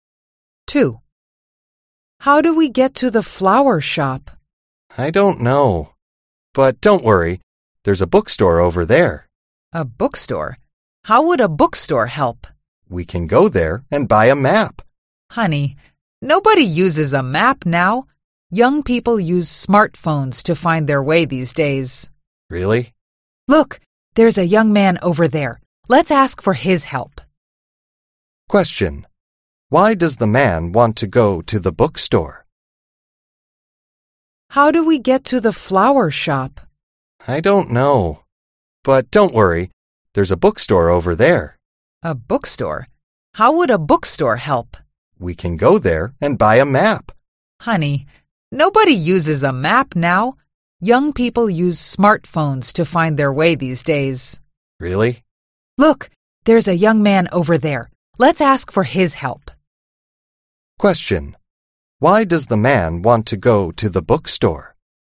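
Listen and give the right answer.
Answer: To buy a map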